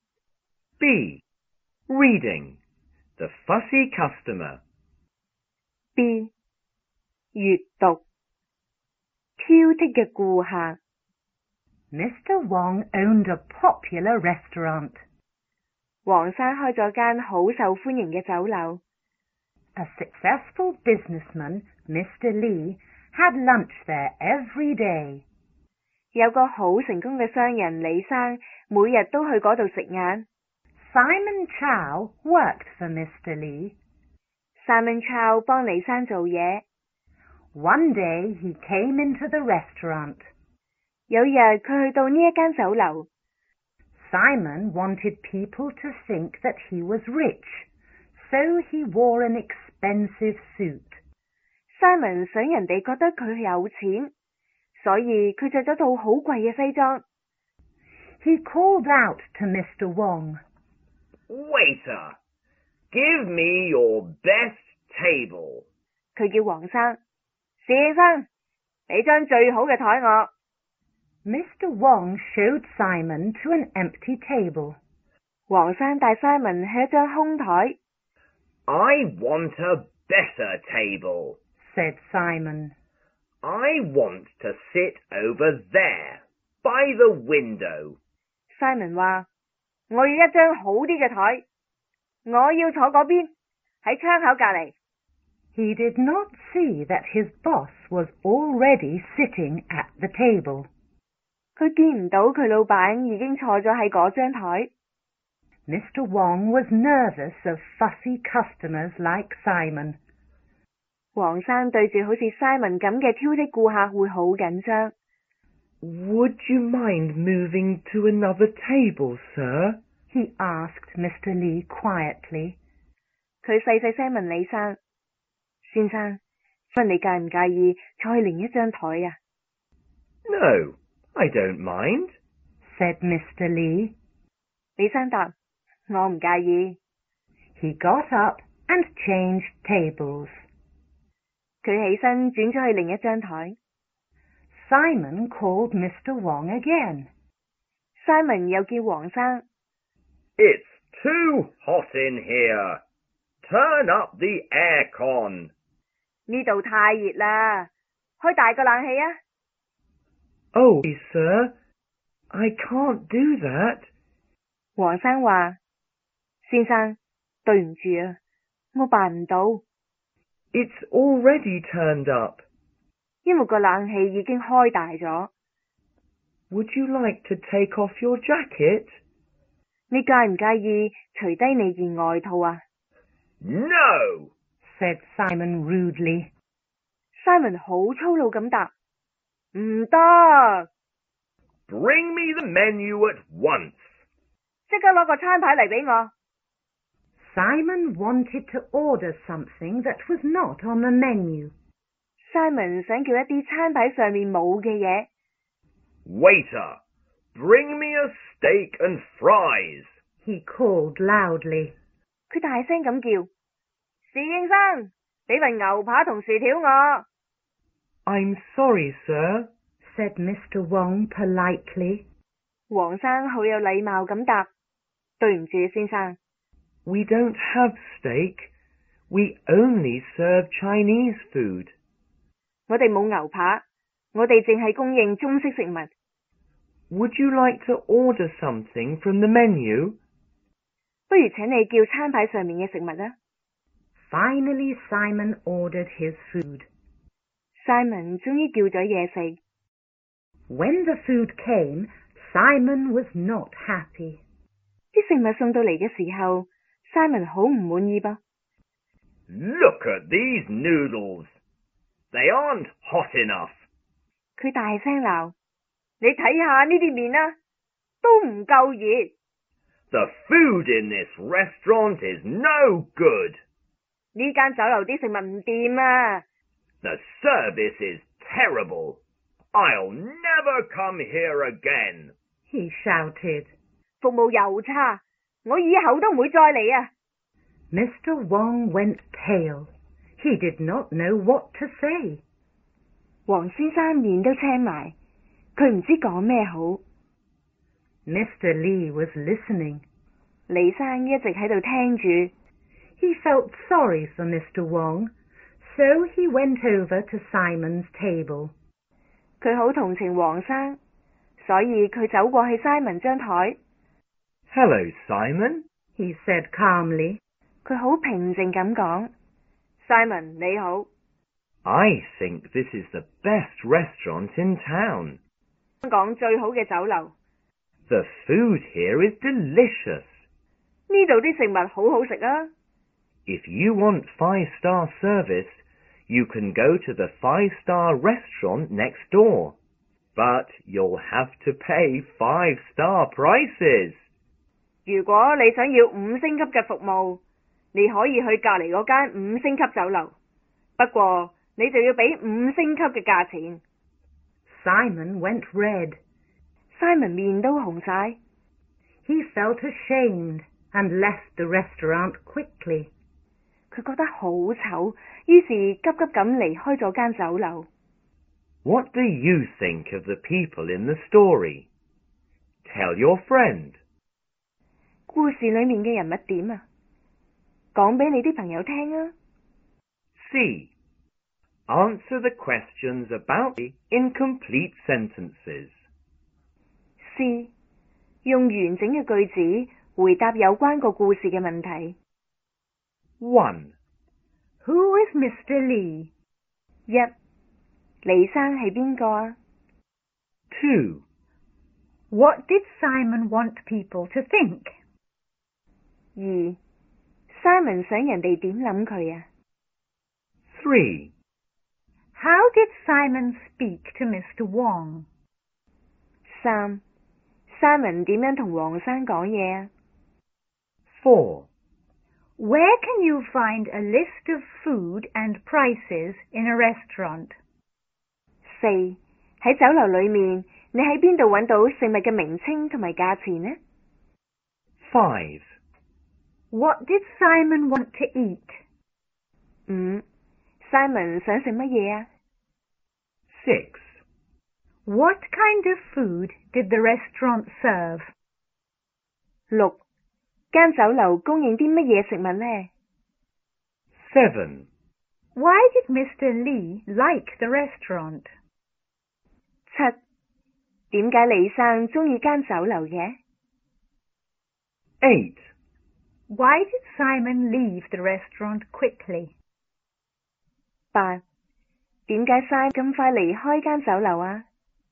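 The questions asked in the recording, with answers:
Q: Who is Mr. Lee?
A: A successful businessman who had lunch at the restaurant every day; Simon's boss

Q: What did Simon want people to think?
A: That he was rich

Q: How did Simon speak to Mr. Wong?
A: Rudely and loudly

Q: Where can you find a list of food and prices in a restaurant?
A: On the menu

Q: What did Simon want to eat?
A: Steak and fries

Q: What kind of food did the restaurant serve?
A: Chinese food

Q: Why did Mr. Lee like the restaurant?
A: He thought it was the best in town and the food was delicious

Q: Why did Simon leave the restaurant quickly?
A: He felt ashamed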